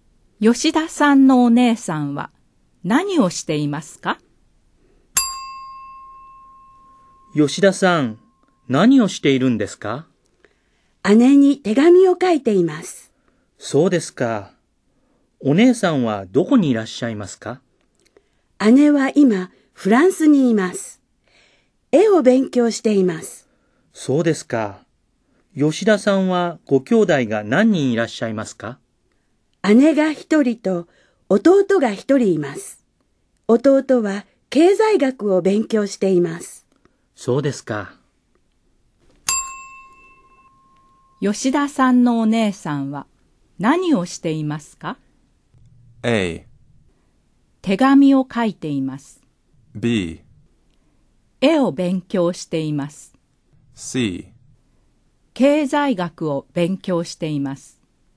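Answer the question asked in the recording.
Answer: B: 絵を勉強しています。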